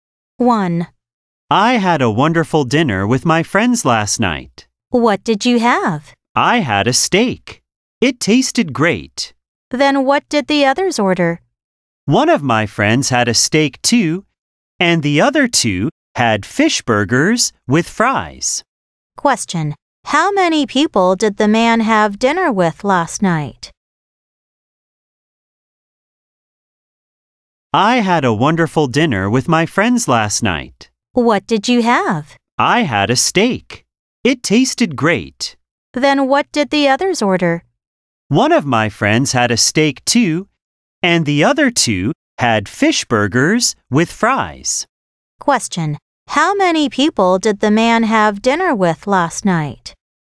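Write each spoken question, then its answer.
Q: How many people did the man have dinner with last night?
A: Three friends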